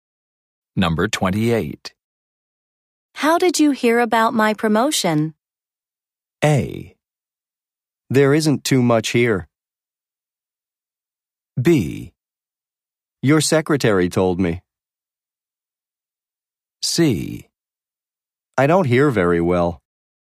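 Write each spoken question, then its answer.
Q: How did you hear about my promotion?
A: B: Your secretary told me.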